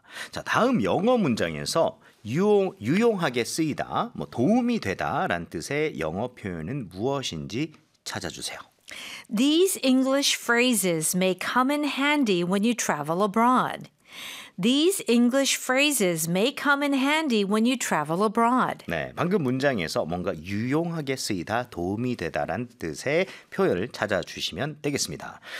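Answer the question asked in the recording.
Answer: come in handy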